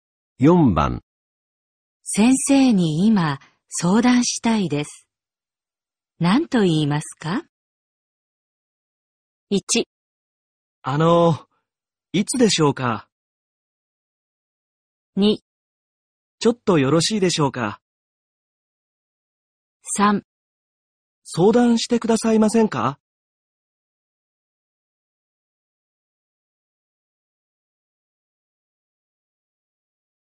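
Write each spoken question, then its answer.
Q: 先生に今相談したいです。何と言いますか?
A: 2: ちょっとよろしいでしょうか?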